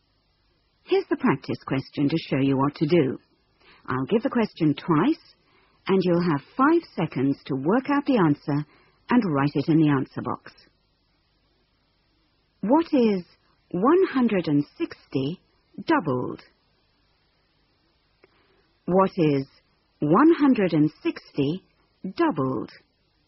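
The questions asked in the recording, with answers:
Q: What is 160 doubled?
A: 320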